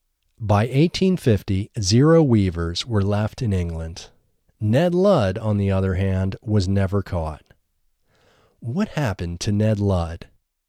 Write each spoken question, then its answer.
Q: What happened to Ned Ludd?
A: Ned Ludd was never caught.